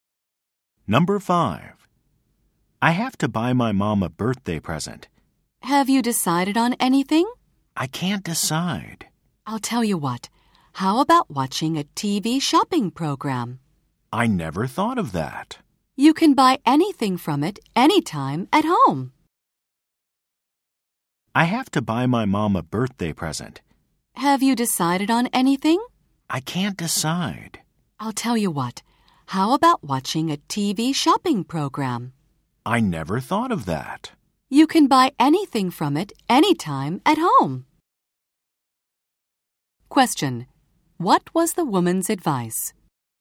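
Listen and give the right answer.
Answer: To watch a TV shopping program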